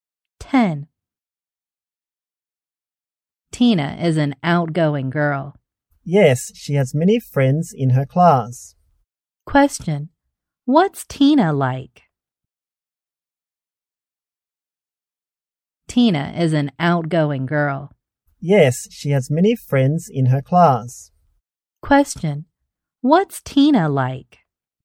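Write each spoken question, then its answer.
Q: What's Tina like?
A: Outgoing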